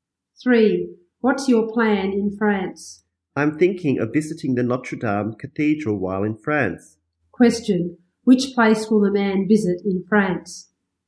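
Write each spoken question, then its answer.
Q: Which place will the man visit in France?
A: The Notre Dame Cathedral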